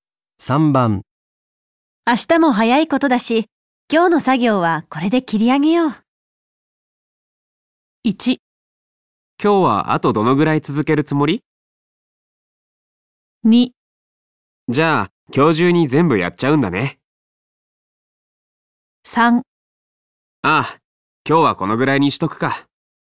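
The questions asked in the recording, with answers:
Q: 明日も早いことだし、今日の作業はこれで切り上げよう。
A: 3: ああ、今日はこのぐらいにしとくか。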